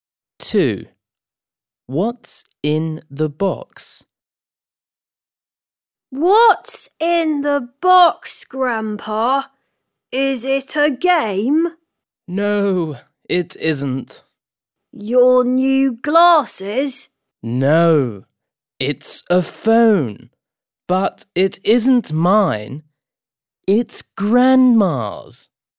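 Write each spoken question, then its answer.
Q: What's in the box?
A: a phone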